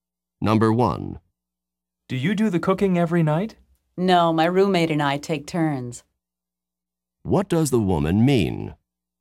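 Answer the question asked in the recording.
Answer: She and her roommate alternate doing the cooking.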